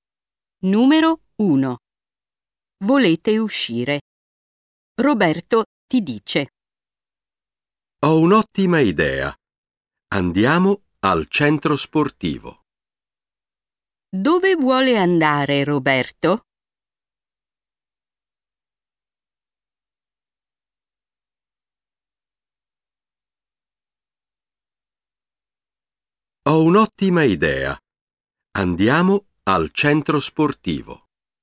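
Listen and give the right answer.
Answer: al centro sportivo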